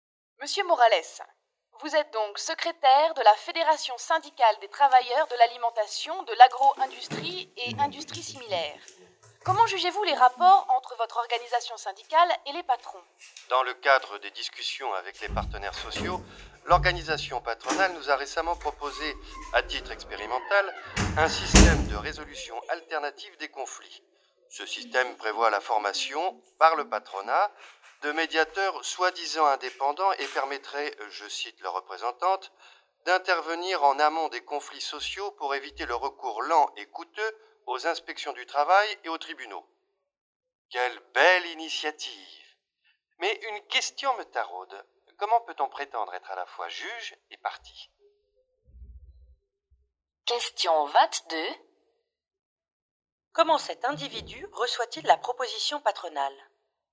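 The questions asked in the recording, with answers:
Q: Comment cet individu reçoit-il la proposition patronale ?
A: Avec scepticisme/ironie : il doute de l'indépendance des médiateurs formés par le patronat (juge et partie).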